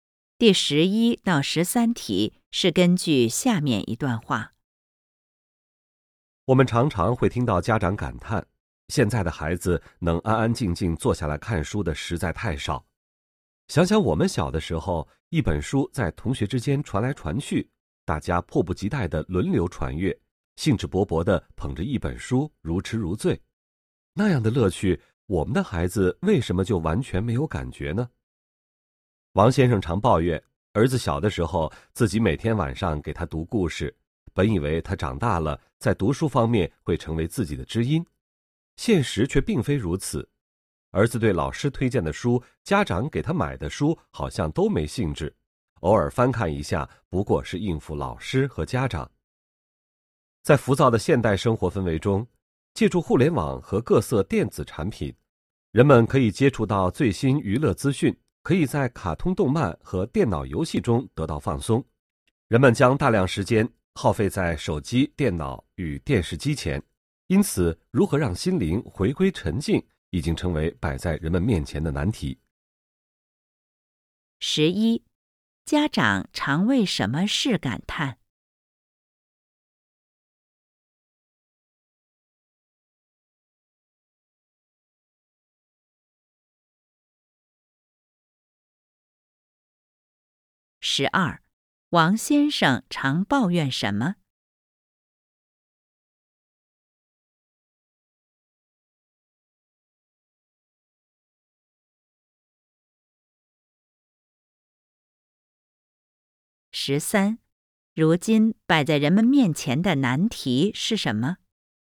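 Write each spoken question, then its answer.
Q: 家长常为什么事感叹?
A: 现在的孩子能安安静静坐下来看书的太少

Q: 王先生常抱怨什么?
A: 儿子长大后对读书没兴趣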